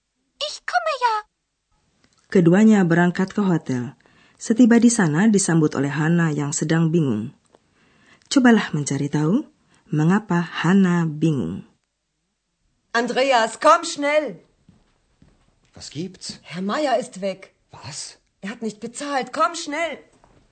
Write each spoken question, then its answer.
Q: Cobalah mencari tahu mengapa Hana bingung.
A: Hana bingung karena Tuan Mayer sudah pergi.